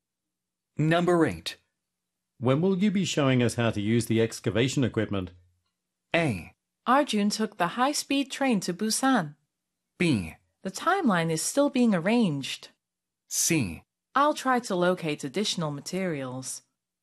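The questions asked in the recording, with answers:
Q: When will you be showing us how to use the excavation equipment?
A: B: The timeline is still being arranged.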